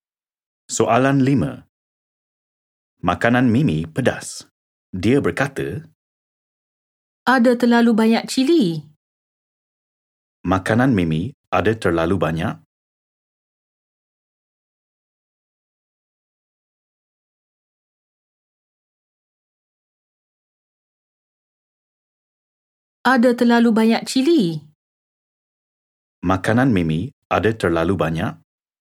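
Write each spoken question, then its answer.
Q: Makanan Mimi ada terlalu banyak?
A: cili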